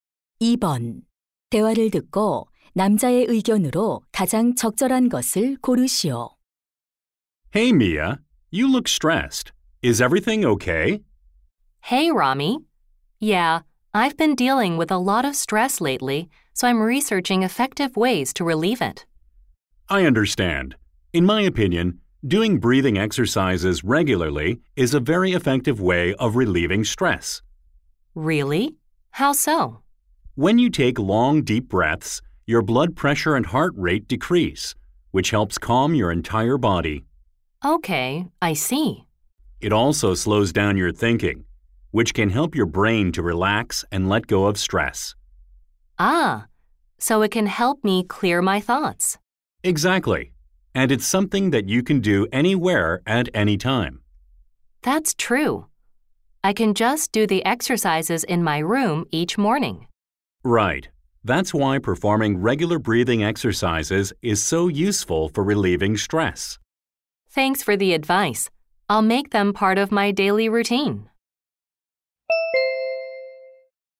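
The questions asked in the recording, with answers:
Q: 대화를 듣고 남자의 의견으로 가장 적절한 것을 고르시오.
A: 규칙적인 호흡 운동은 스트레스 해소에 효과적이다.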